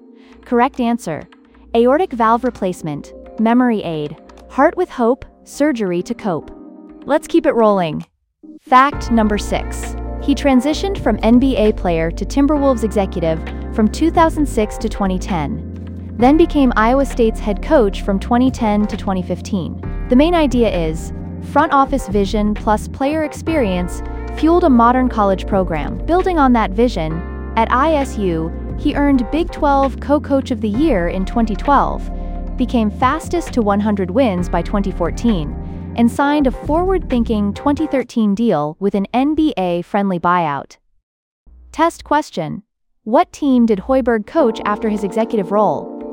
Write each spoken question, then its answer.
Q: What team did Hoiberg coach after his executive role?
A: Correct answer, Iowa State.